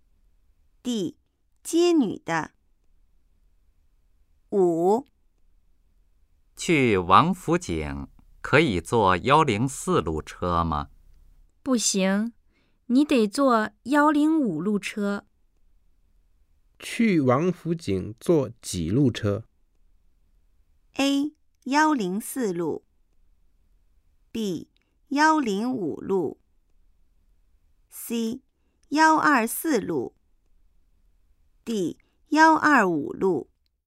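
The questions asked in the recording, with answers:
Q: 去王府井坐几路车?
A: B: 105路。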